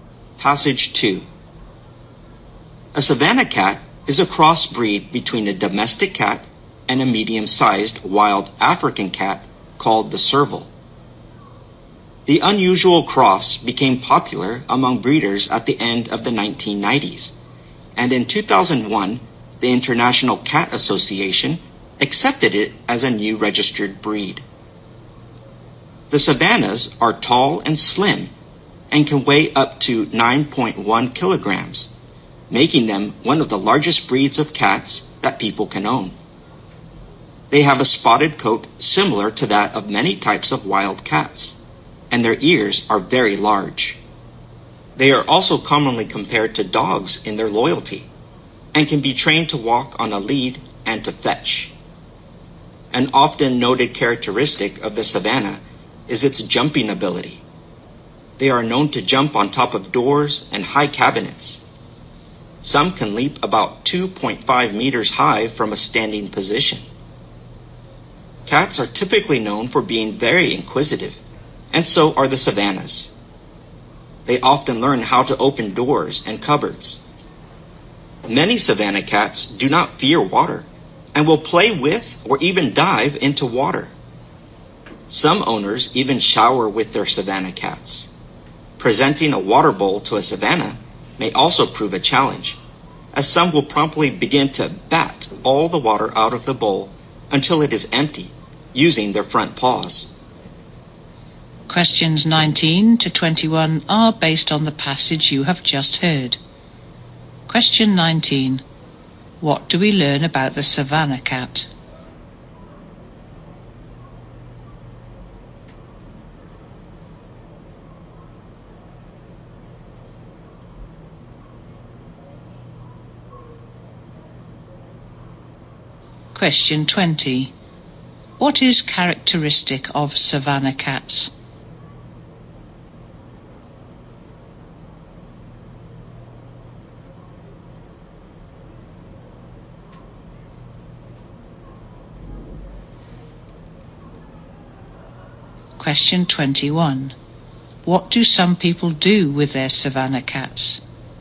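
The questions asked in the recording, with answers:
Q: What is characteristic of savannah cats?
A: Their jumping ability

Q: What do some people do with their savannah cats?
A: They shower with them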